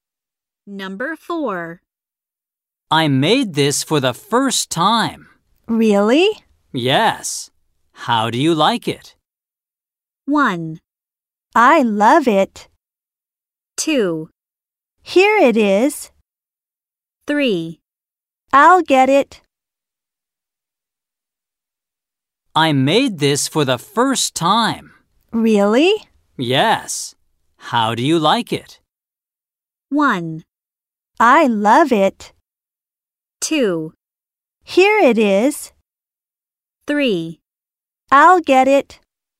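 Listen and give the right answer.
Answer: 1: I love it.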